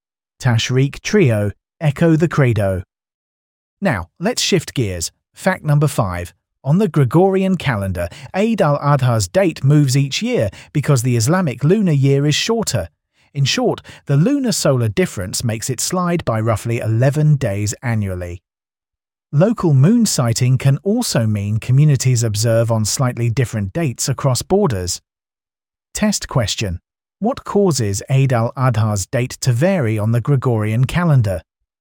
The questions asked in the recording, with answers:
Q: What causes Eid al-Adha's date to vary on the Gregorian calendar?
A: Lunar-solar difference.